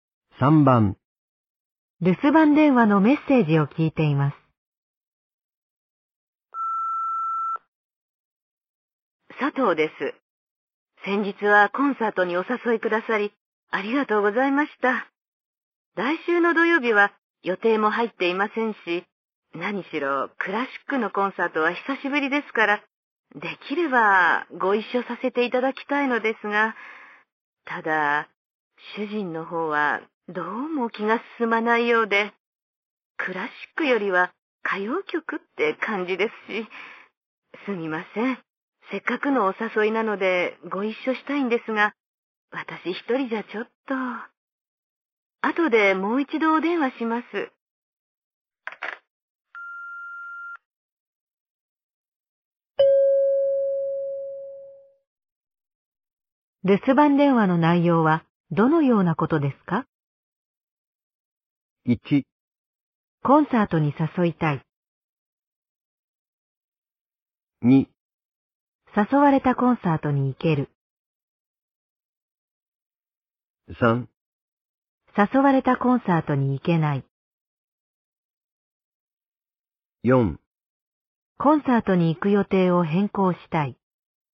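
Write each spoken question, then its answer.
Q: 留守番電話の内容はどのようなことですか?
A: 3: 誘われたコンサートに行けない。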